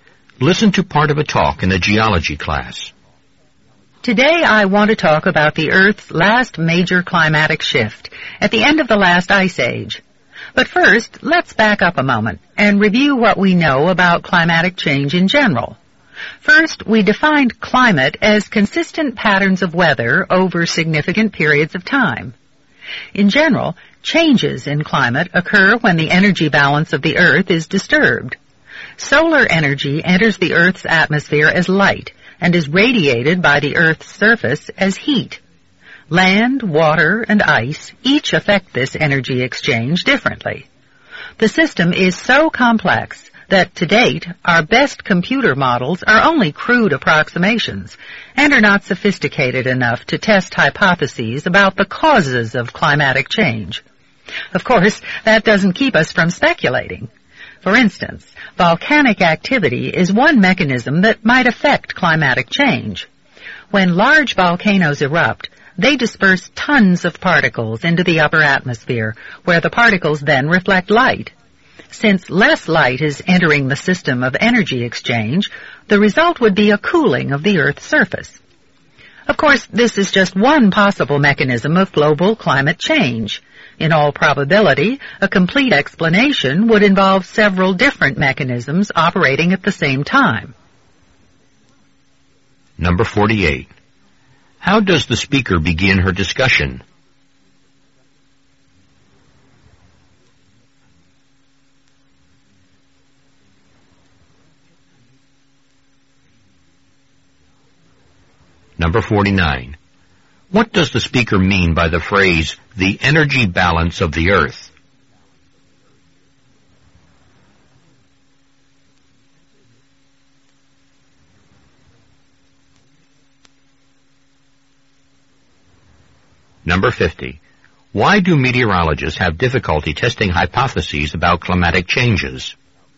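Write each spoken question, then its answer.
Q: How does the speaker begin her discussion?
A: By reviewing what is known about climatic change in general

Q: What does the speaker mean by the phrase, the energy balance of the Earth?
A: The exchange between solar energy entering as light and heat radiated by the Earth's surface

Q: Why do meteorologists have difficulty testing hypotheses about climatic changes?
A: The system is too complex; computer models are only crude approximations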